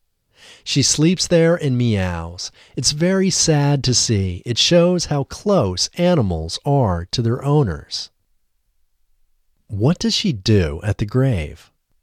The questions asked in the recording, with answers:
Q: What does she do at the grave?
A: She sleeps at the grave and meows.